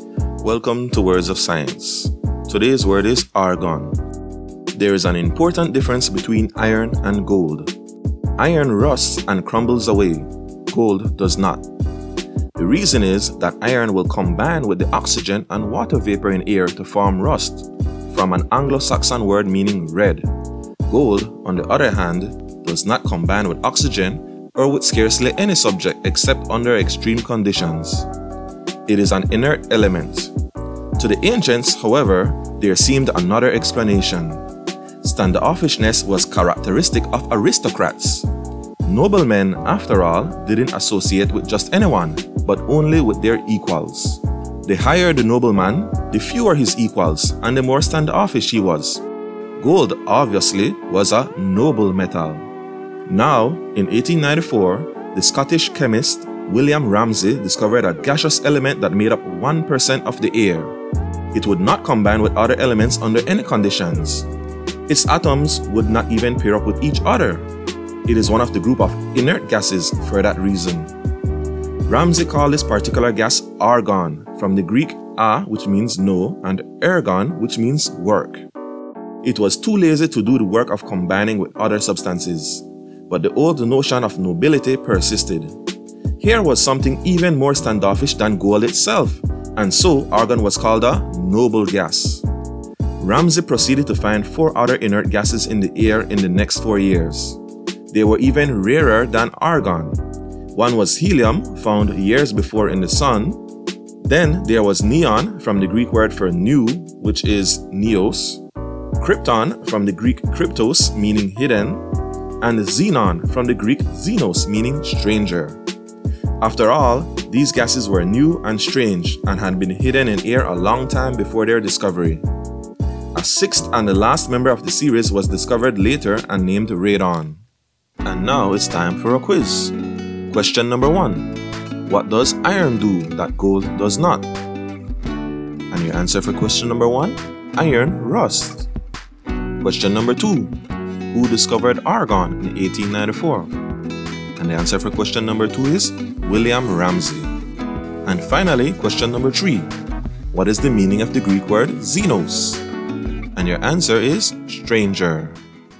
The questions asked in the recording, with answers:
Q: What does iron do that gold does not?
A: Iron rusts.